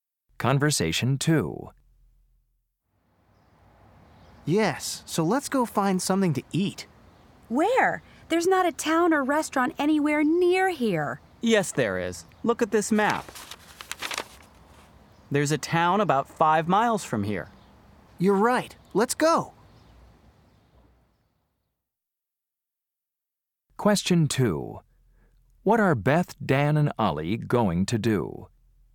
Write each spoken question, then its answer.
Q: What are Beth, Dan, and Ollie going to do?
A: I'm so glad there's a town near here.